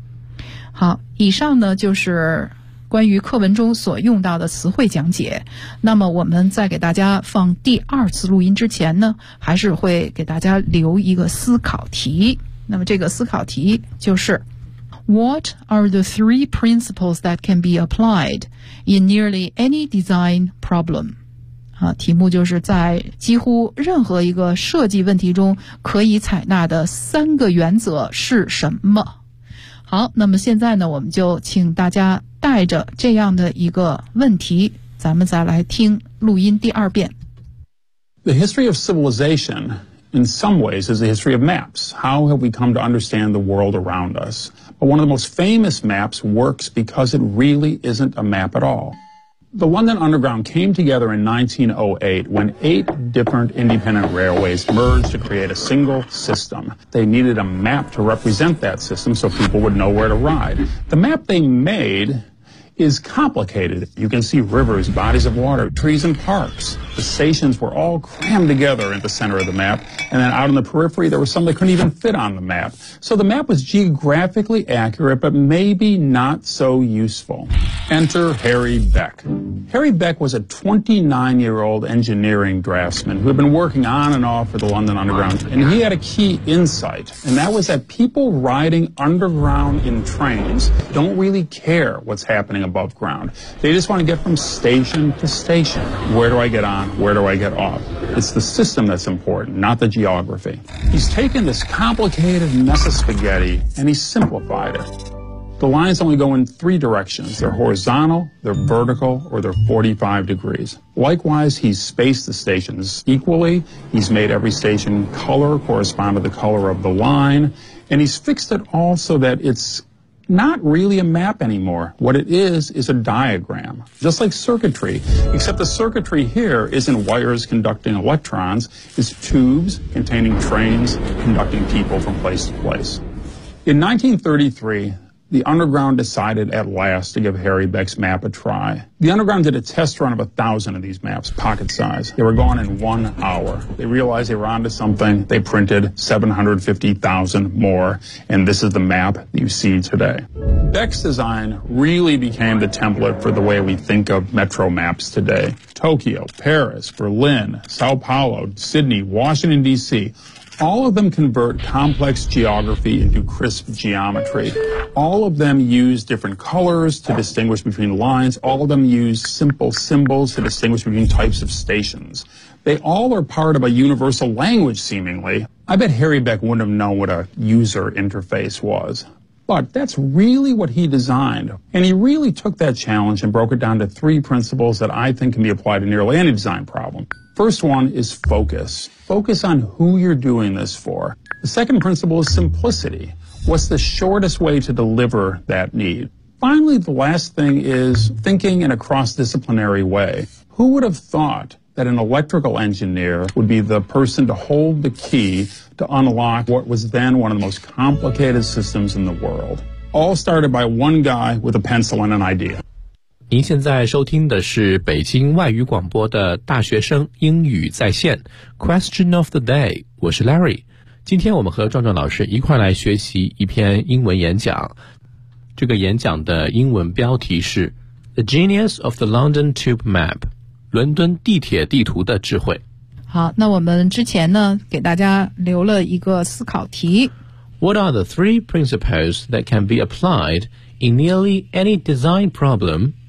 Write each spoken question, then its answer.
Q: What are the three principles that can be applied in nearly any design problem?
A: First one is focus、第一个原则就是专注。